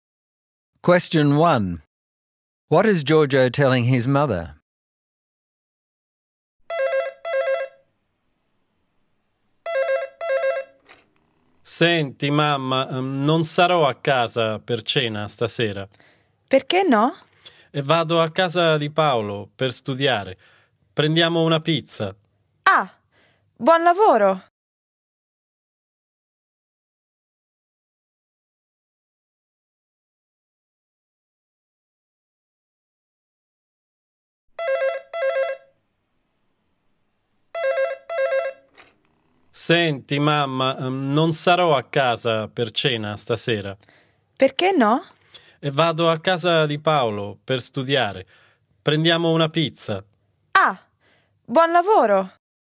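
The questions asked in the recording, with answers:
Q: What is Giorgio telling his mother?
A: He won't be home for dinner tonight because he is going to Paolo's house to study, and they will get a pizza.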